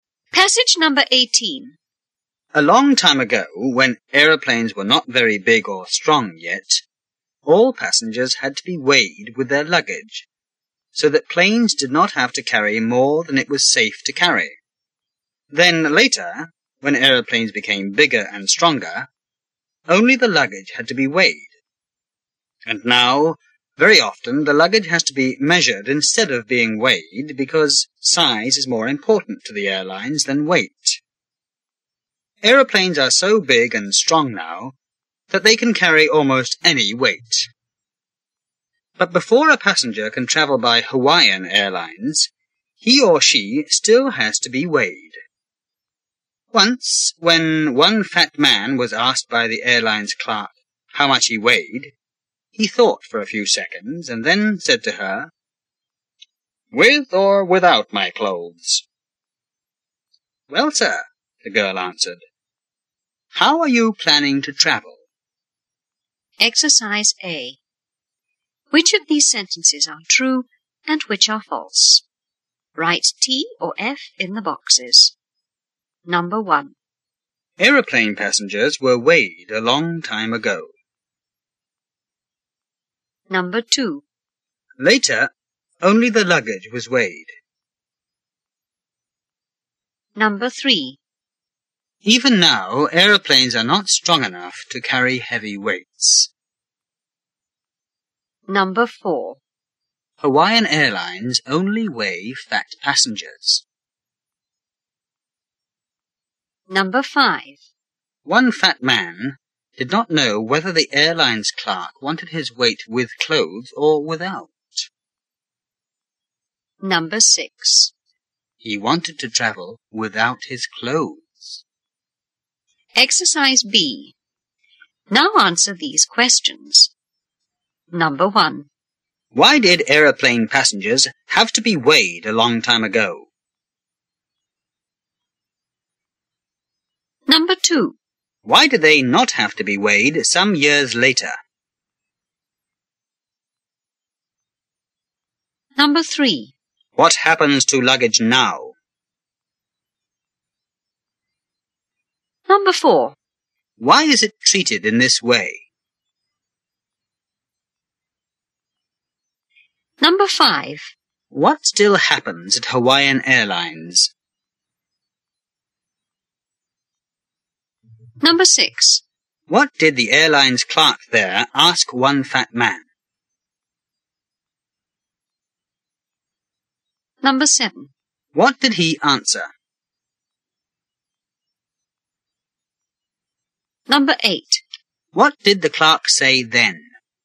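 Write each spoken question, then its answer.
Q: Aeroplane passengers were weighed a long time ago.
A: True

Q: Later, only the luggage was weighed.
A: True

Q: Even now, aeroplanes are not strong enough to carry heavy weights.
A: False

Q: Hawaiian Airlines only weigh fat passengers.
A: False

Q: One fat man did not know whether the airline's clerk wanted his weight with clothes or without.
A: True

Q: He wanted to travel without his clothes.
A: False

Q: Why did aeroplane passengers have to be weighed a long time ago?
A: Because planes were not big or strong, so they could not safely carry too much weight

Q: Why do they not have to be weighed some years later?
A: Because aeroplanes became bigger and stronger

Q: What happens to luggage now?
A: It is often measured instead of weighed

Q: Why is it treated in this way?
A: Because size is more important to airlines than weight

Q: What still happens at Hawaiian Airlines?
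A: Passengers still have to be weighed

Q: What did the airline's clerk there ask one fat man?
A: How much he weighed

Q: What did he answer?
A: "With or without my clothes?"

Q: What did the clerk say then?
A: "Well, sir, how are you planning to travel?"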